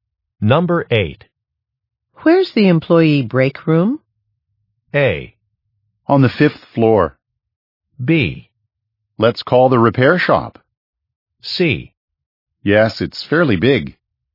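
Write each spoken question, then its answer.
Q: Where's the employee break room?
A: A: On the 5th floor.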